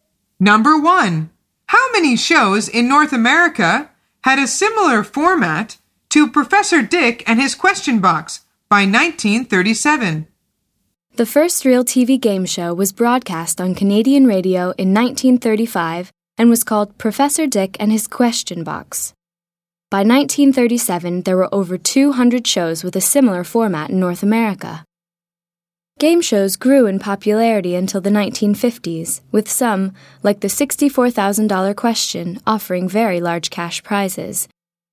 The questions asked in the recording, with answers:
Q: how many shows in North America had a similar format to Professor Dick and His Question Box by 1937?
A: The answer is over 200.